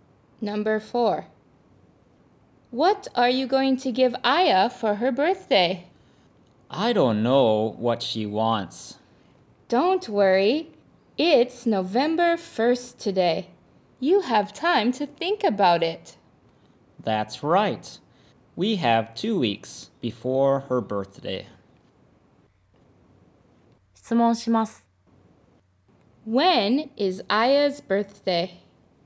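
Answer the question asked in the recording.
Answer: November 15th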